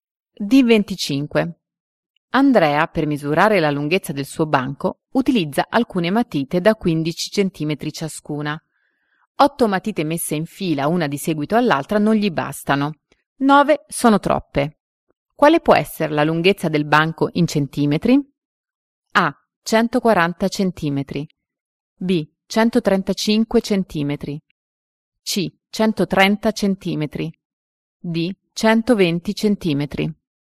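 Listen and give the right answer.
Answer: C: 130 centimetri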